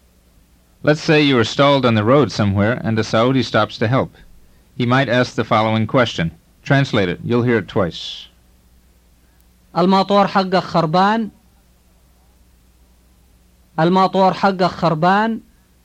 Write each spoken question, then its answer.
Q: Translate it. You'll hear it twice.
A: It means, is your motor not working?